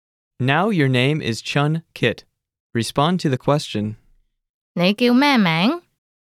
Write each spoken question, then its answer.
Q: 你叫咩名?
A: 我叫俊杰。